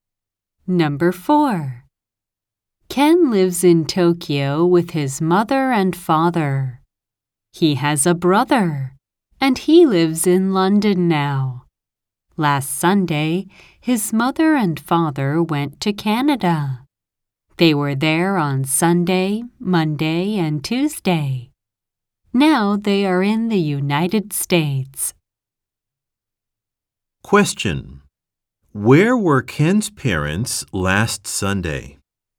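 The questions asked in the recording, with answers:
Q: Where were Ken's parents last Sunday?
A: In Canada.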